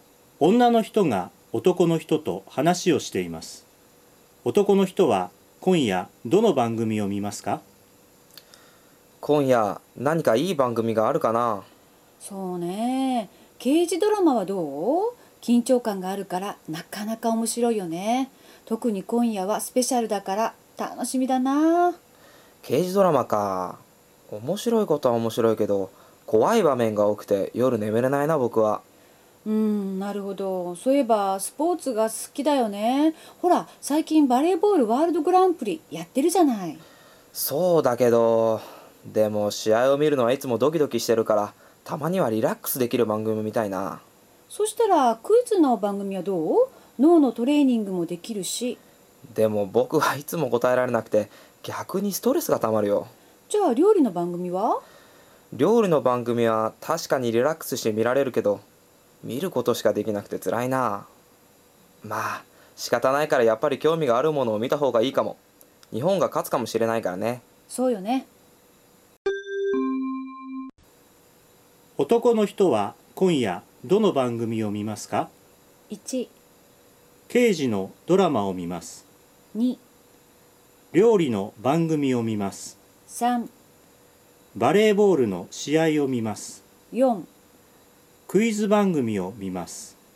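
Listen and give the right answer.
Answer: 3: バレーボールの試合を見ます。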